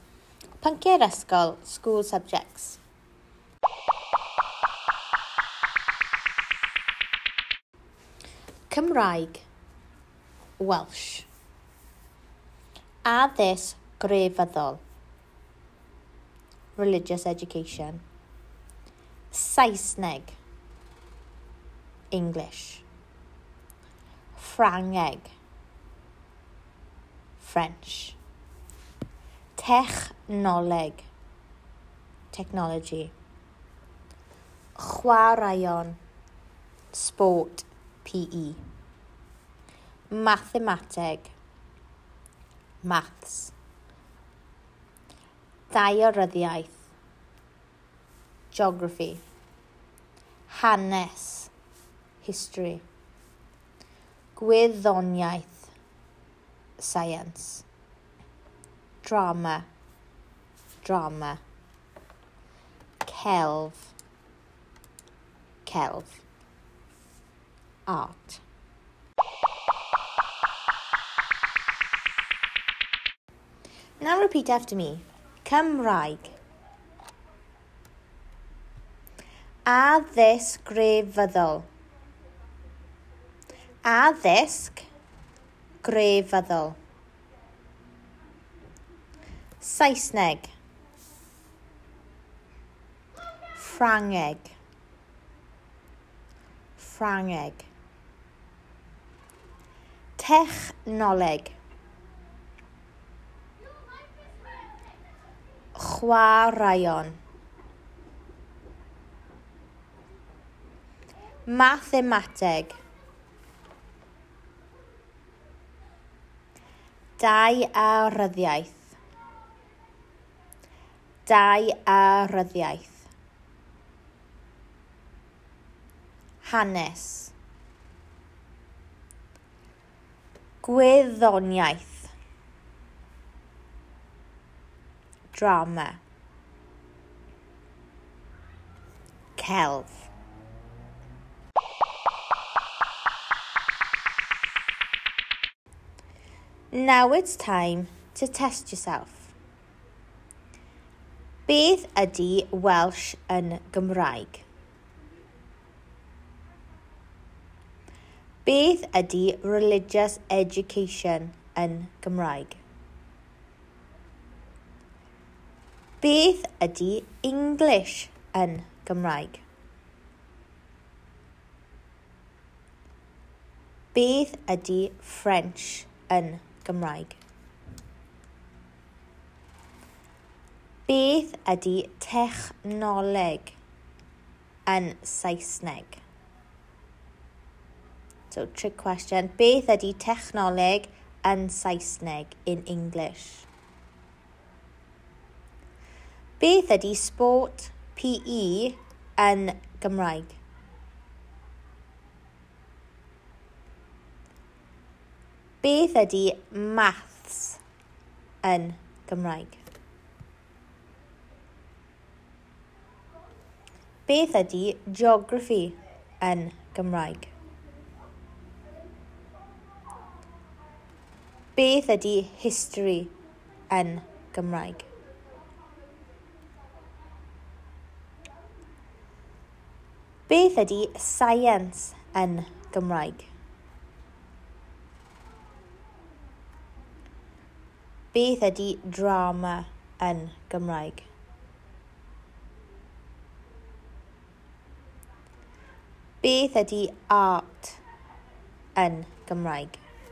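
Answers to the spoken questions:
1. Cymraeg
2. Addysg grefyddol
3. Saesneg
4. Ffrangeg
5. Technology
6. Chwaraeon
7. Mathemateg
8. Daearyddiaeth
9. Hanes
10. Gwyddoniaeth
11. Drama
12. Celf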